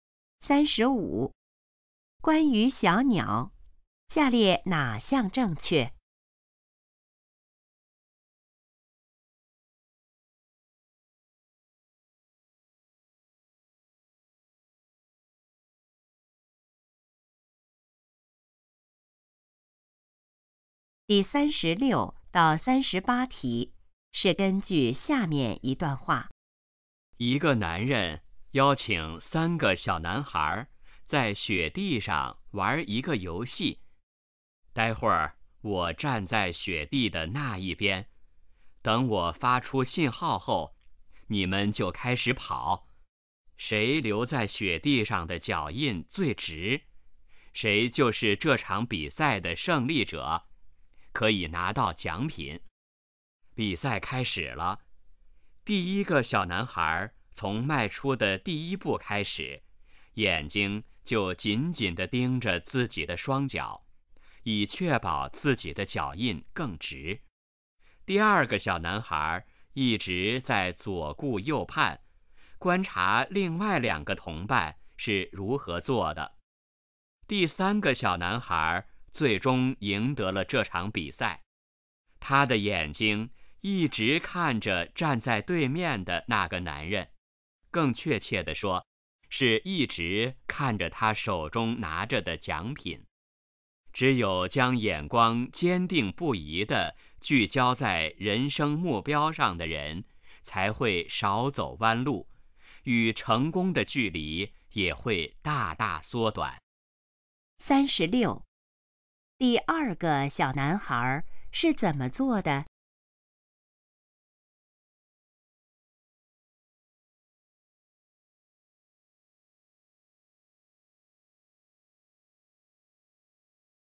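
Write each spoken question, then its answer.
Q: 第二个小男孩是怎么做的?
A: 左顾右盼,观察另外两个同伴

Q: 谁得到了奖品?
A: 第三个小男孩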